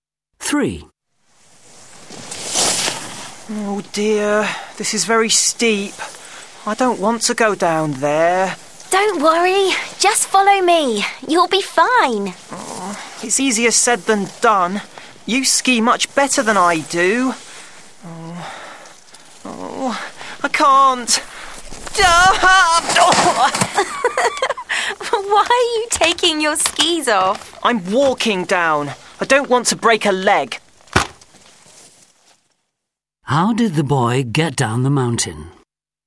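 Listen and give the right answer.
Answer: He walked down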